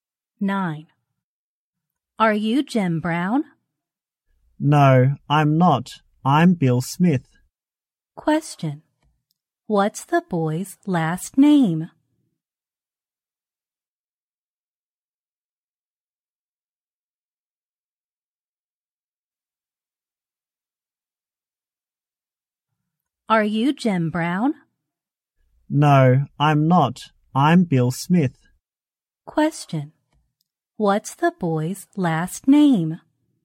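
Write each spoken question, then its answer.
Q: What's the boy's last name?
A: Smith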